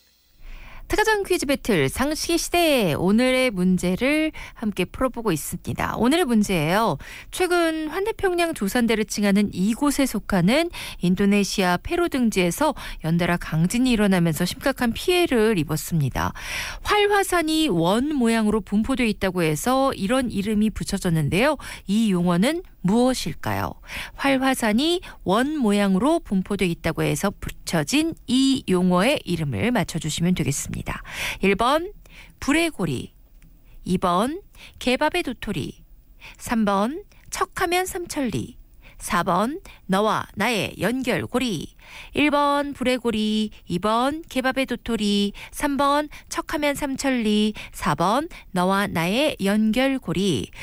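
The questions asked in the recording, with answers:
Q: 이 용어는 무엇일까요?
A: 1번: 불의 고리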